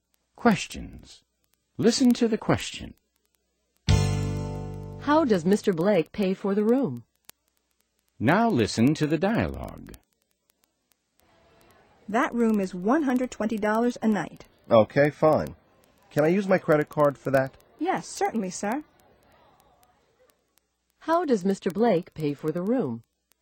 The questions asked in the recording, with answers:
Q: How does Mr. Blake pay for the room?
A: He uses his credit card.